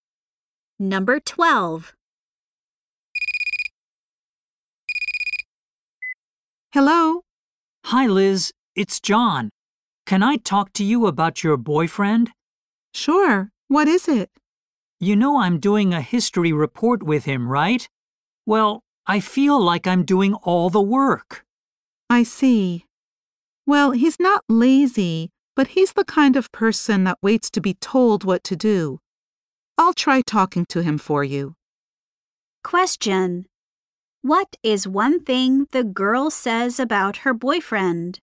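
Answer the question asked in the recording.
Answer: He waits to be told what to do (he's not lazy)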